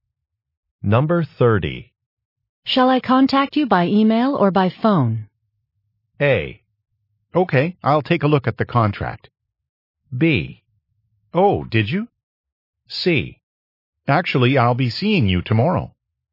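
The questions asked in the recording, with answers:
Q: Shall I contact you by email or by phone?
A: C: Actually, I'll be seeing you tomorrow.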